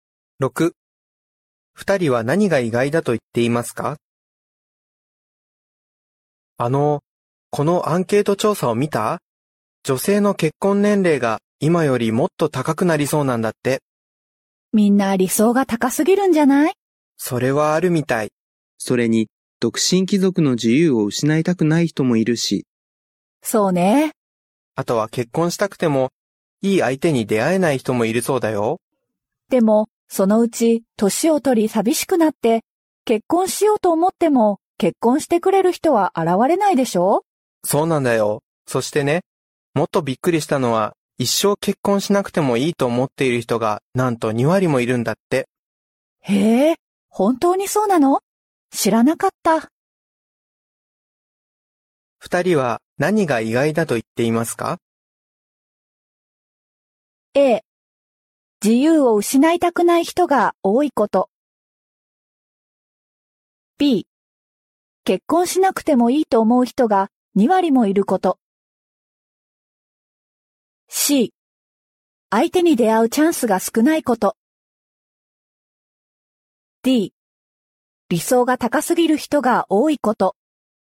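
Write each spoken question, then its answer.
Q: 二人は何が意外だと言っていますか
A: B、結婚しなくてもいいと思う人が2割もいること。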